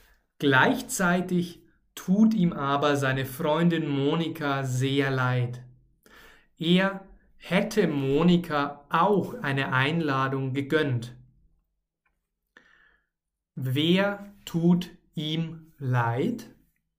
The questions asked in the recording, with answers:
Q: Wer tut ihm leid?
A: Seine Freundin Monika.